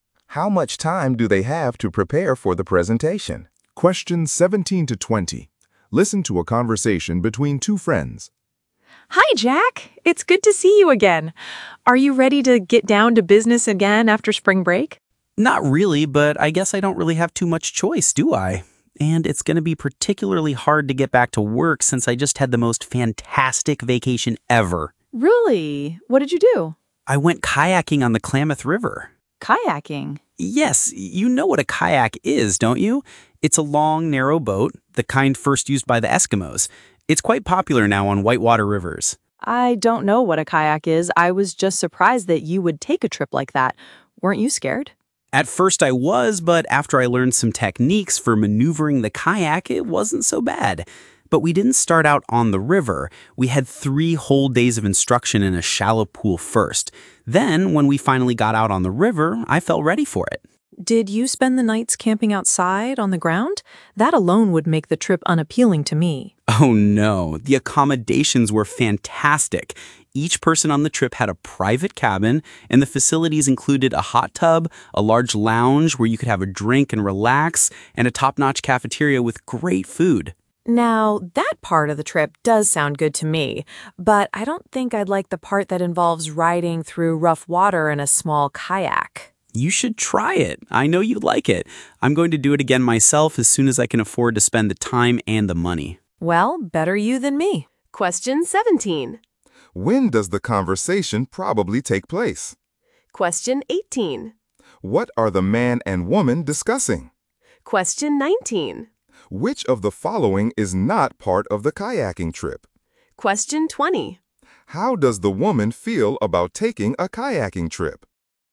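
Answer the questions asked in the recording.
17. Just after spring break
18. The man's kayaking trip on the Klamath River
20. She doesn't want to; riding rough water in a kayak doesn't appeal to her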